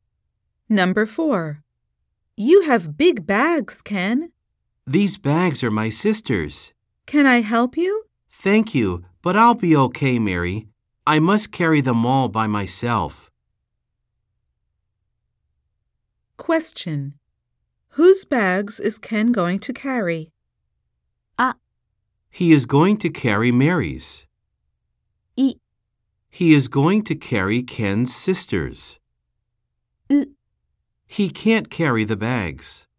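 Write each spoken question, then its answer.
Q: Whose bags is Ken going to carry?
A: イ: He is going to carry Ken's sister's.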